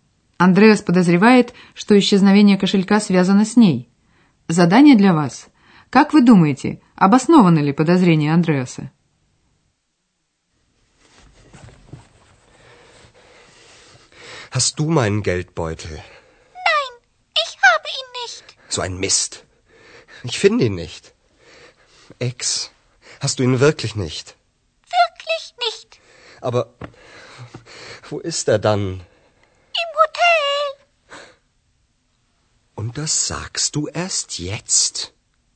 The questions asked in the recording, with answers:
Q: Как вы думаете, обоснованы ли подозрения Андреаса?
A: Это правда, кошелька у Экс нет.